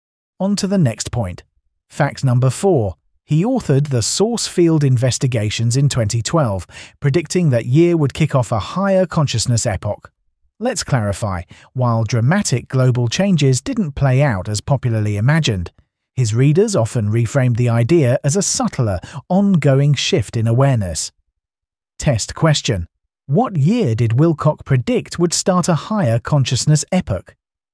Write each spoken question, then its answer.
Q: What year did Wilcock predict would start a higher consciousness epoch?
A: Correct answer, 2012.